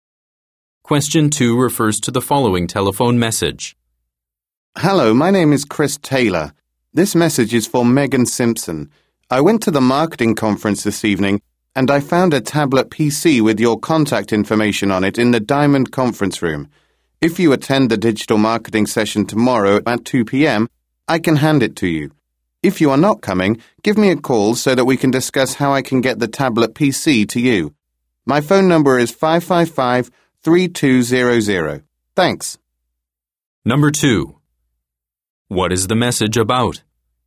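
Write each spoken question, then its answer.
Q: What is the message about?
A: A lost tablet PC that was found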